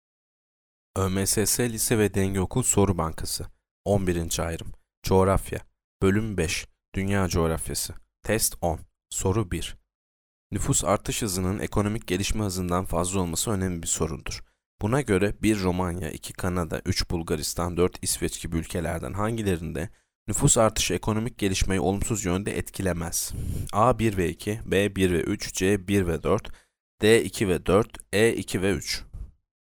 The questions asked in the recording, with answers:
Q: Buna göre 1 Romanya, 2 Kanada, 3 Bulgaristan, 4 İsveç gibi ülkelerden hangilerinde nüfus artışı ekonomik gelişmeyi olumsuz yönde etkilemez?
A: Yanıt D. 2 ve 4. 2 Kanada, 4 İsveç.